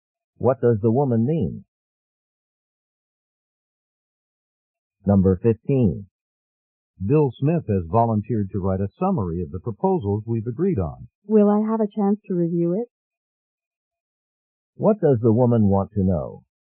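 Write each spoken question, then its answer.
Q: What does the woman want to know?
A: Whether she will get a chance to review the summary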